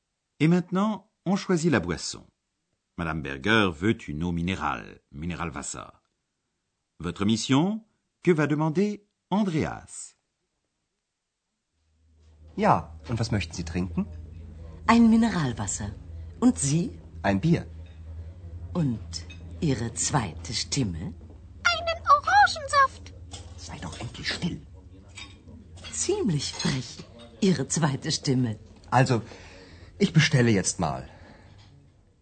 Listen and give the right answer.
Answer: Andreas dit qu'il aimerait une bière